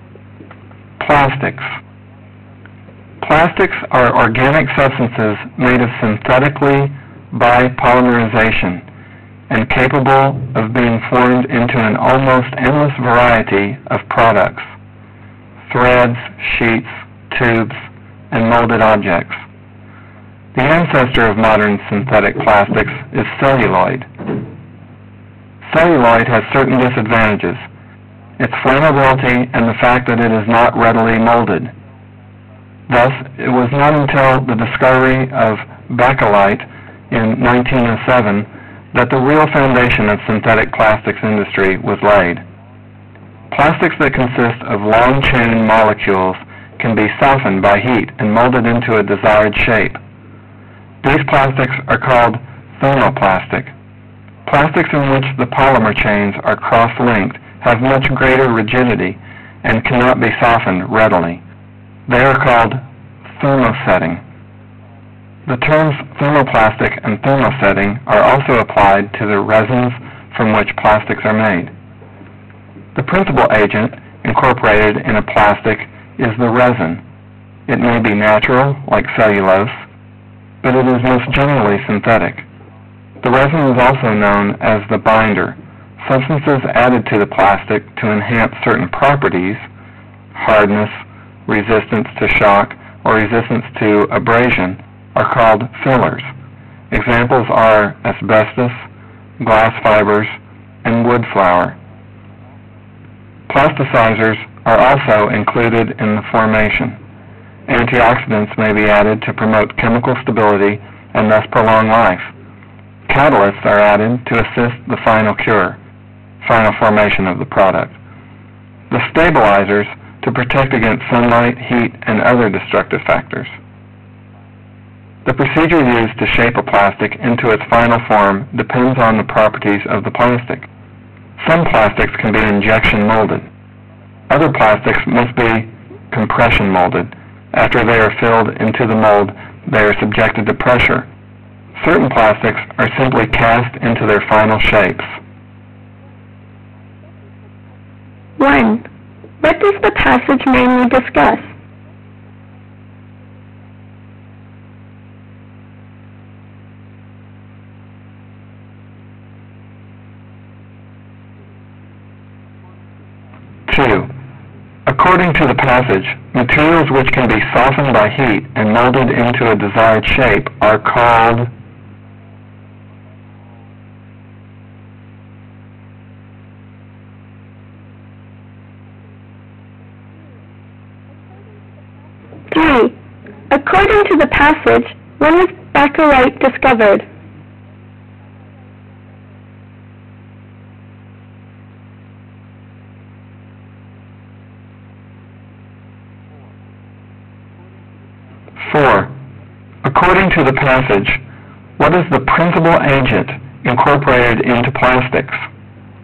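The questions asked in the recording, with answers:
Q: What does the passage mainly discuss?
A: Plastics: what they are made of, their types, and how they are shaped

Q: According to the passage, materials which can be softened by heat and molded into a desired shape are called...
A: thermoplastic

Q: According to the passage, when was Bakelite discovered?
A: In 1907

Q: According to the passage, what is the principal agent incorporated into plastics?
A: The resin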